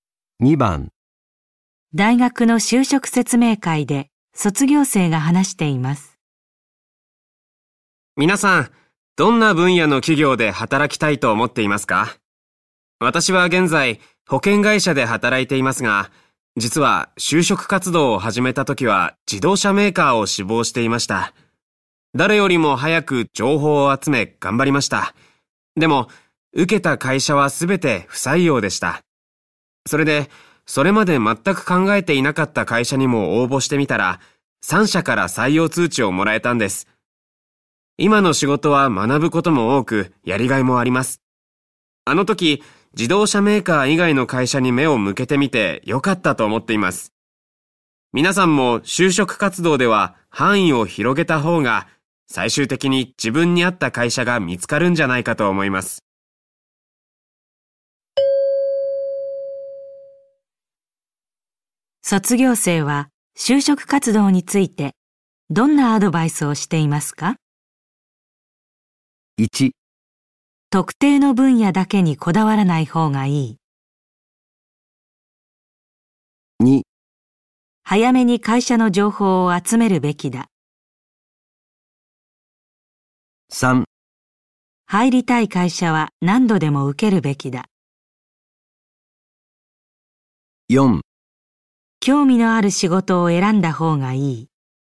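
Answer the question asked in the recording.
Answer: 1: 特定の分野だけにこだわらない方がいい。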